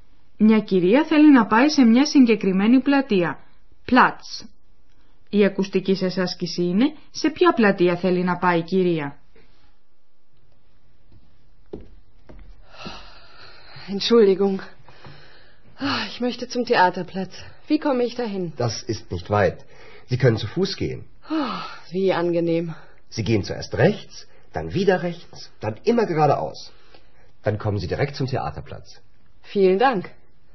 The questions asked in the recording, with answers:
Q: Η ακουστική σας άσκηση είναι σε ποια πλατεία θέλει να πάει η κυρία.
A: Η πλατεία που ψάχνει να βρει η κυρία είναι η πλατεία θεάτρου.